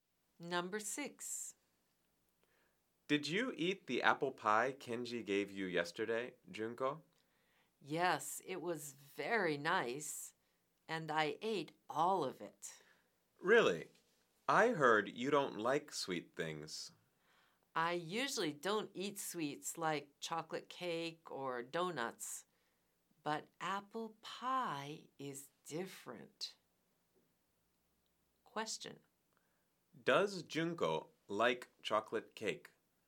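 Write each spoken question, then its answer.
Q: Does Junko like chocolate cake?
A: No, she doesn't.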